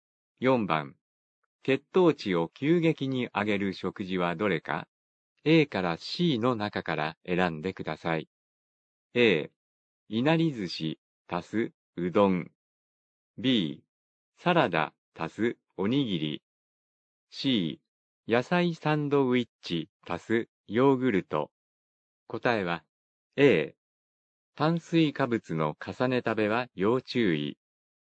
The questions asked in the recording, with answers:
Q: 血糖値を急激に上げる食事はどれか、 A から C の中から選んでください。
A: 答えは A、